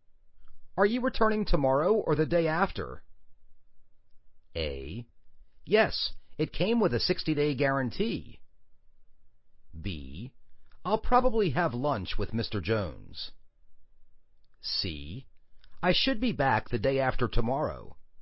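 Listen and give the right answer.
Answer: C: I should be back the day after tomorrow.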